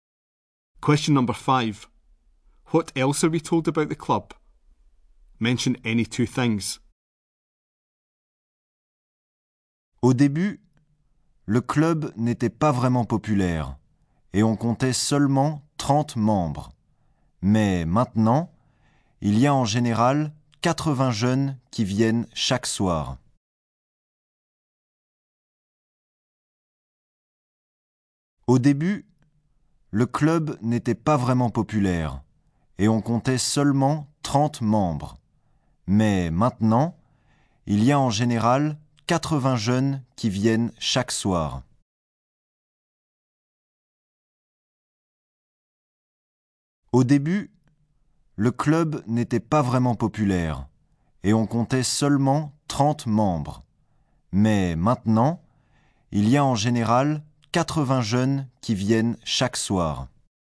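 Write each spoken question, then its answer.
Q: What else are we told about the club?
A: At first it was not popular with only 30 members; now about 80 young people come every evening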